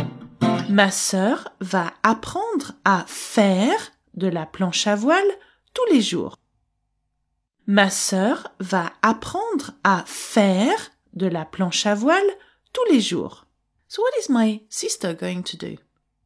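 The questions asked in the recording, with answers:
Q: So what is my sister going to do?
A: Learn to windsurf every day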